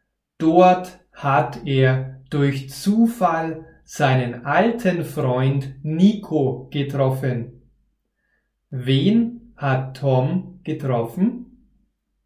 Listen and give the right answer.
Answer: Seinen alten Freund Nico.